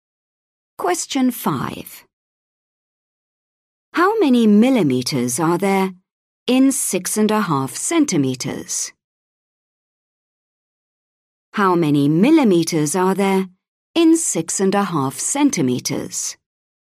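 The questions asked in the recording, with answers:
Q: How many millimeters are there in 6.5 centimeters?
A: 65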